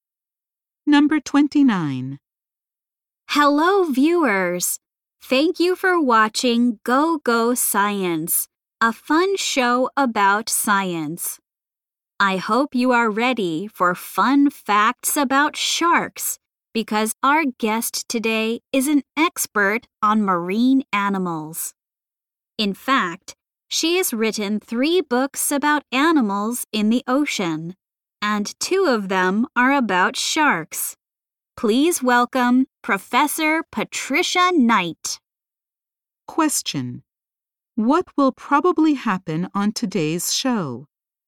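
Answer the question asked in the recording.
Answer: An expert will talk about sharks.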